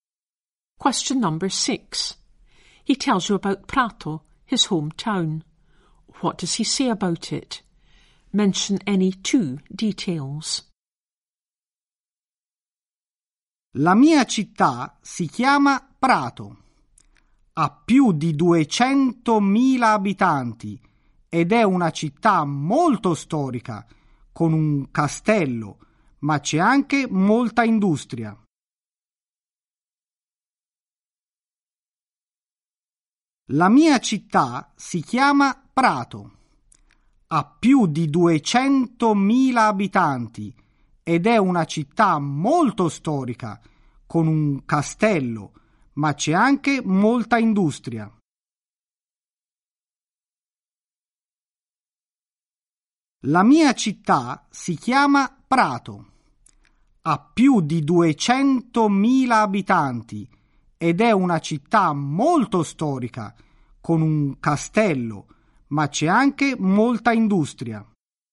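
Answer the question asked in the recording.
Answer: Over 200,000 inhabitants, very historic with a castle, lots of industry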